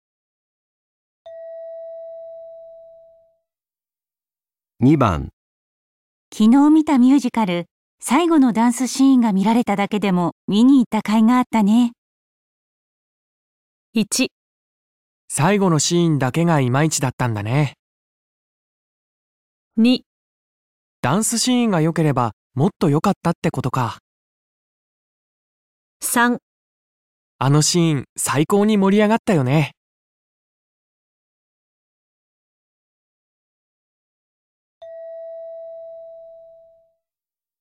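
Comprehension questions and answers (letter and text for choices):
昨日見たミュージカル、 最後のダンスシーンが見られただけでも見に行った甲斐があったね。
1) 最後のシーンだけがイマイチだったんだね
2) ダンスシーンが良ければもっと良かったってことか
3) あのシーン最高に盛り上がったよね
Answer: 3) あのシーン最高に盛り上がったよね

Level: N1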